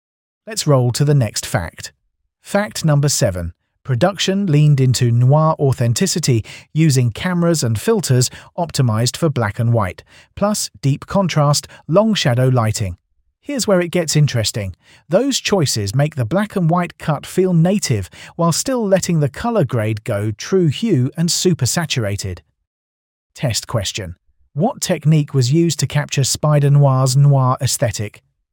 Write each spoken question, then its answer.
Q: What technique was used to capture Spider-Noir's noir aesthetic?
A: Black and white cameras and filters.